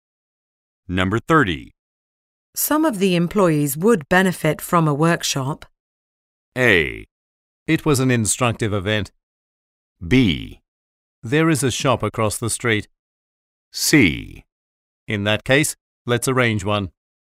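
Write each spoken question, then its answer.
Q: Some of the employees would benefit from a workshop.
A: C: In that case, let's arrange one.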